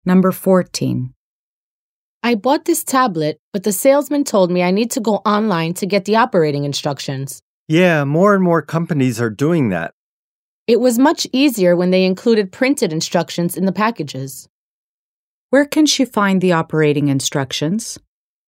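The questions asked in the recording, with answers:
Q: Where can she find the operating instructions?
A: Online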